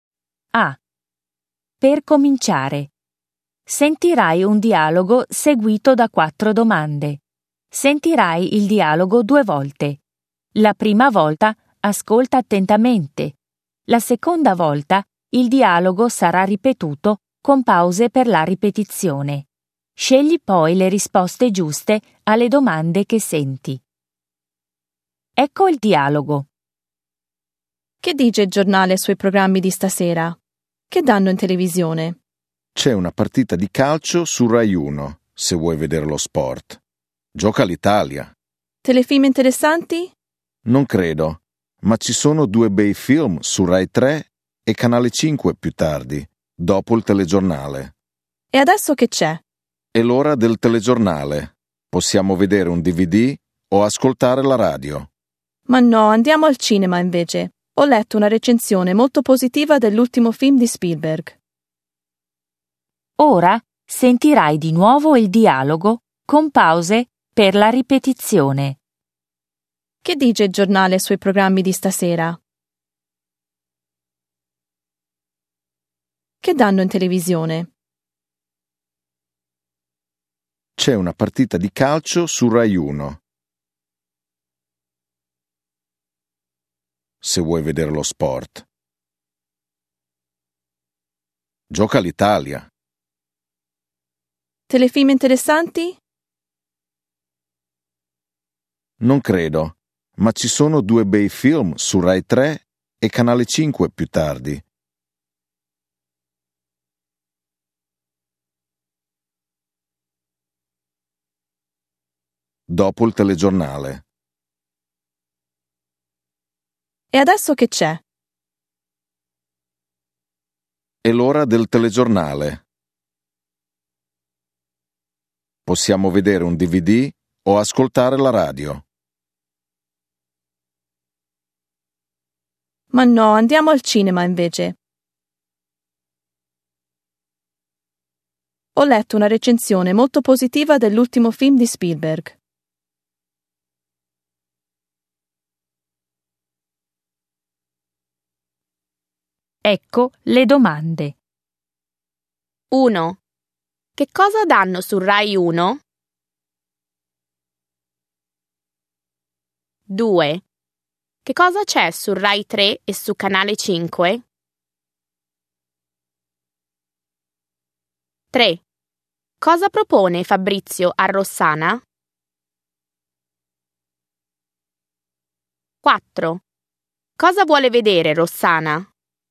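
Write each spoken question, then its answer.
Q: Che cosa danno su Rai 1?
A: Una partita di calcio (gioca l'Italia)

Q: Che cosa c'è su Rai 3 e su Canale 5?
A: Due bei film, dopo il telegiornale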